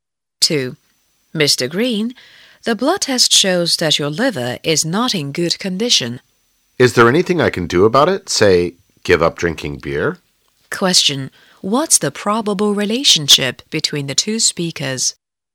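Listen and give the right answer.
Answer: Doctor and patient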